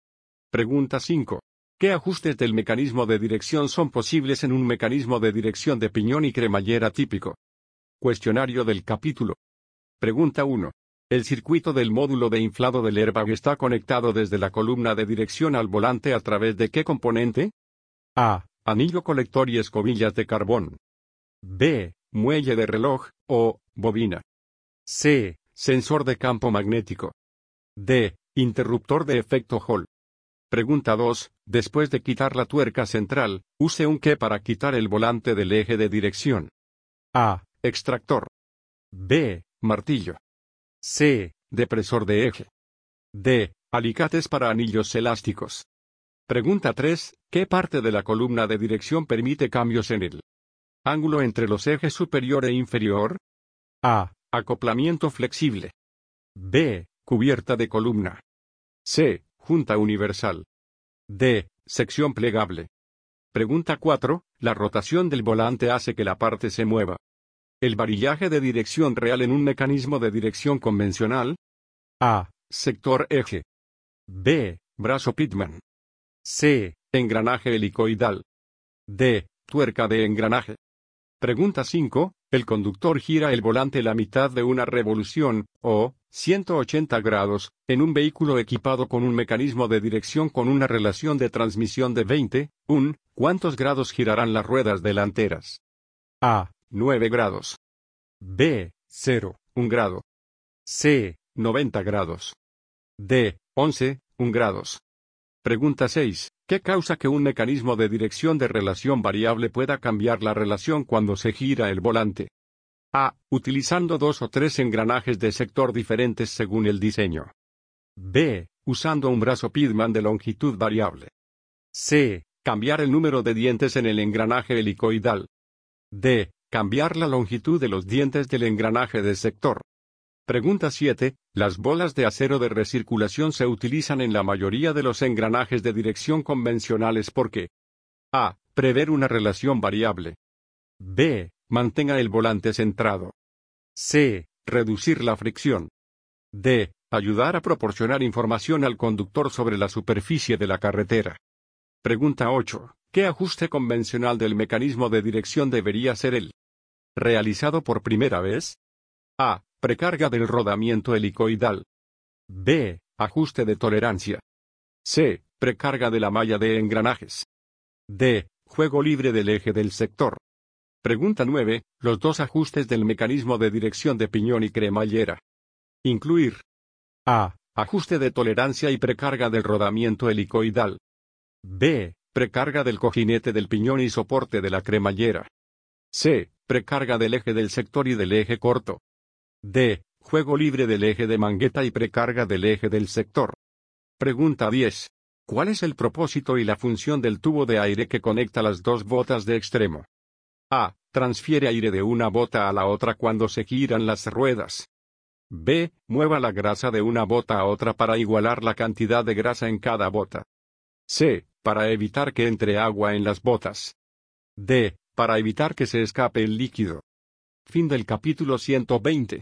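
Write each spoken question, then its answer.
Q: ¿El conductor gira el volante la mitad de una revolución, o 180 grados, en un vehículo equipado con un mecanismo de dirección con una relación de transmisión de 20:1, ¿cuántos grados girarán las ruedas delanteras?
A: A: 9 grados.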